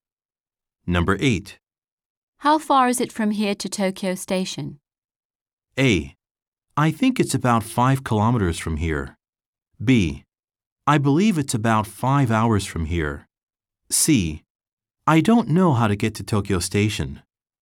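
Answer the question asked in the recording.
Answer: A: I think it's about 5 kilometers from here.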